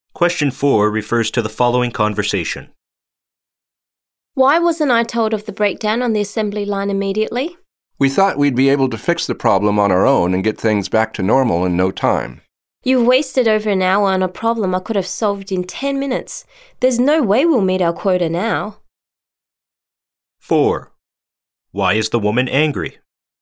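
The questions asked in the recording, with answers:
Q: Why is the woman angry?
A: She wasn't told about the assembly line breakdown right away, and over an hour was wasted, so they won't meet their quota.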